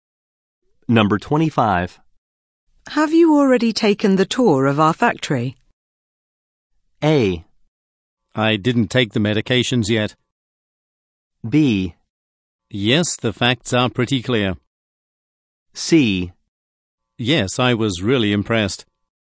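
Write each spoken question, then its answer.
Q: Have you already taken the tour of our factory?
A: C: Yes, I was really impressed.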